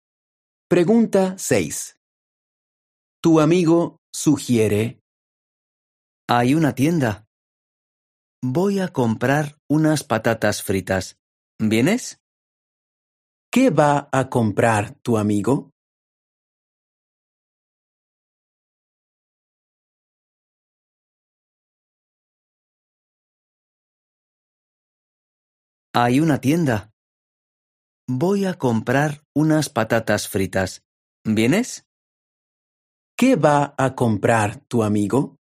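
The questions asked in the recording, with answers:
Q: ¿Qué va a comprar tu amigo?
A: Patatas fritas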